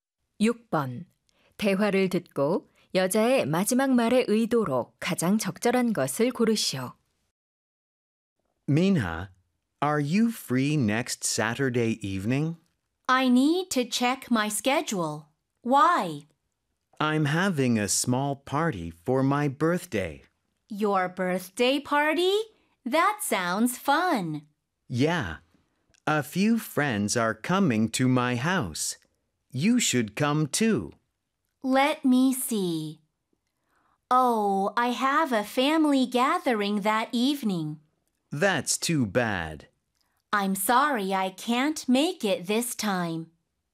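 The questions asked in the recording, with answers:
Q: 대화를 듣고 여자의 마지막 말의 의도로 가장 적절한 것을 고르시오.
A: 초대 거절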